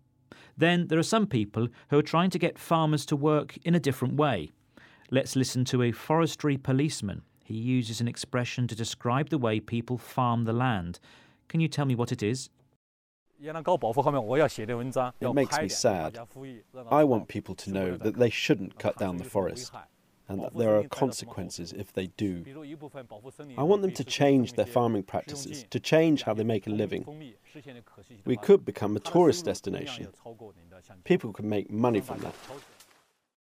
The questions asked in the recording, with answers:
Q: He uses an expression to describe the way people farm the land. Can you tell me what it is?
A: He said farming practices. This means the way people farm the land.